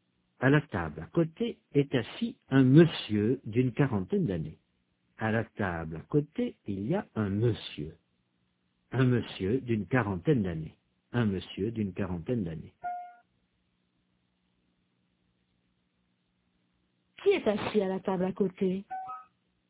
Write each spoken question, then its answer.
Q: Qui est assis à la table à côté?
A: Un monsieur d'une quarantaine d'années.